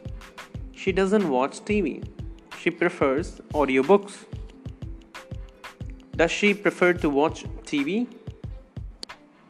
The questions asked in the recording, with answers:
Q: Does she prefer to watch TV?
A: No, she does not prefer to watch TV.